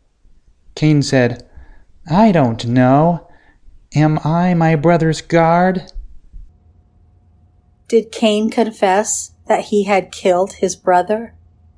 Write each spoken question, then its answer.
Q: Did Cain confess that he had killed his brother?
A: No, Cain did not confess.